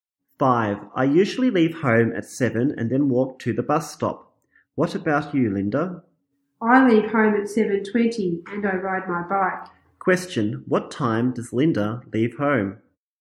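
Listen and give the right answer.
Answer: At 7:20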